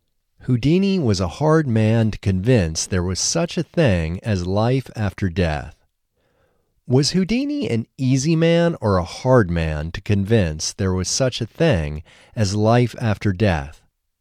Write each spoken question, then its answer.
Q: Was Houdini an easy man or a hard man to convince there was such a thing as life after death?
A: Houdini was a hard man to convince there was such a thing as life after death.